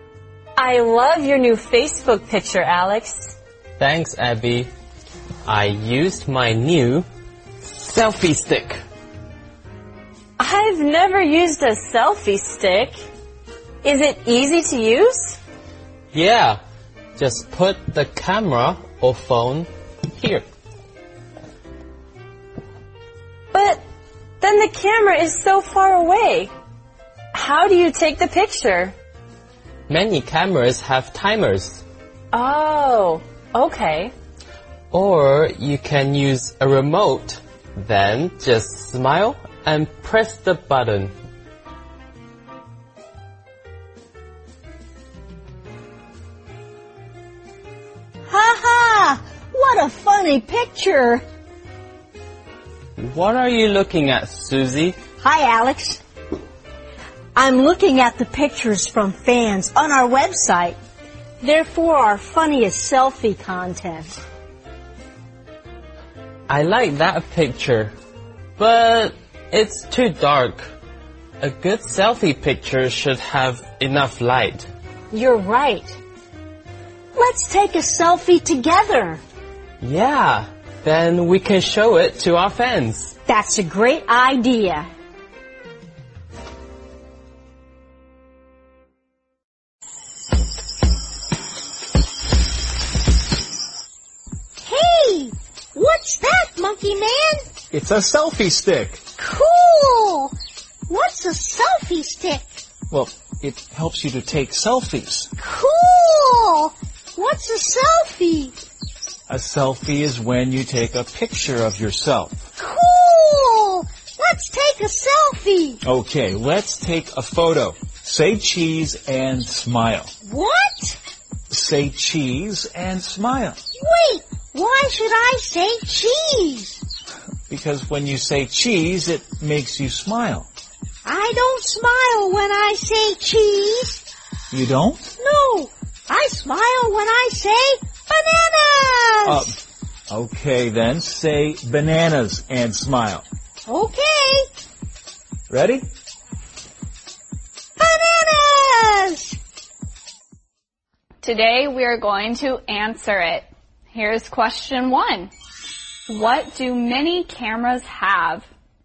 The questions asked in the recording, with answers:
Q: What do many cameras have?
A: Many cameras have timers.